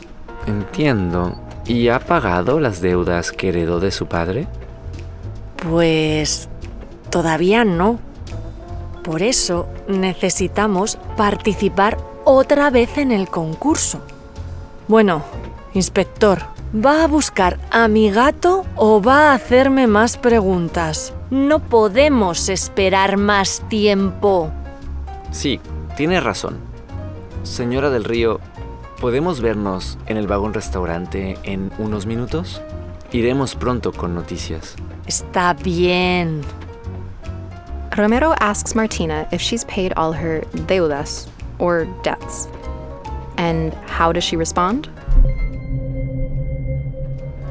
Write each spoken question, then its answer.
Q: And how does she respond?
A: Todavía no, she says. Not yet.